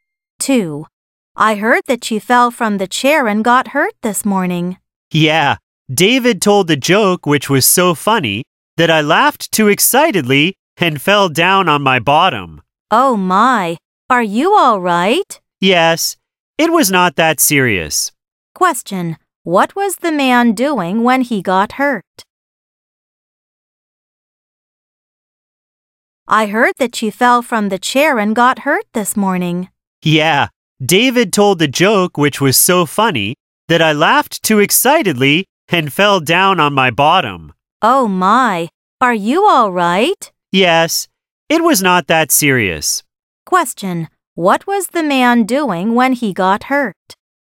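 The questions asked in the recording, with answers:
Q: what was the man doing when he got hurt?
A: Laughing at David's joke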